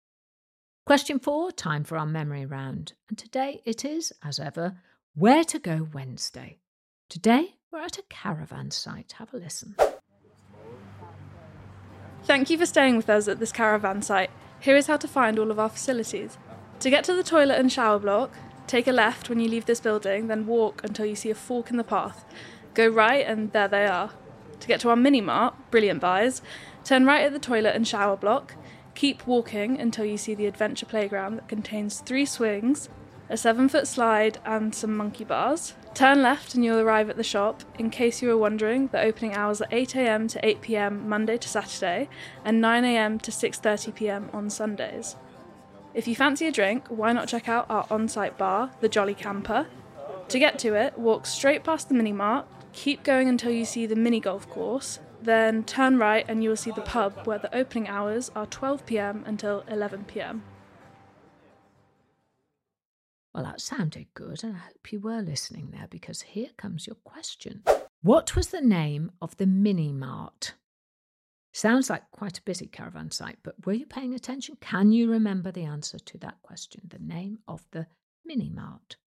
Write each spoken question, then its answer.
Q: What was the name of the mini mart?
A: The answer is Brilliant Buys.